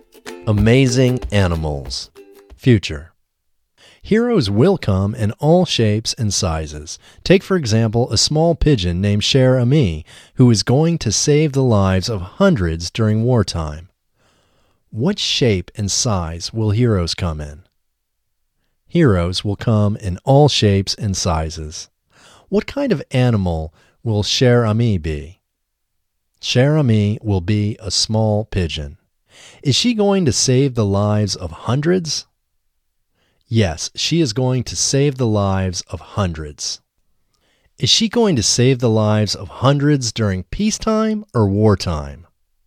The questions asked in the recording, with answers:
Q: What shape and size will heroes come in?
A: Heroes will come in all shapes and sizes.

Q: What kind of animal will Cher Ami be?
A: Cher Ami will be a small pigeon.

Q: Is she going to save the lives of hundreds during peacetime or wartime?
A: She is going to save the lives of hundreds during wartime.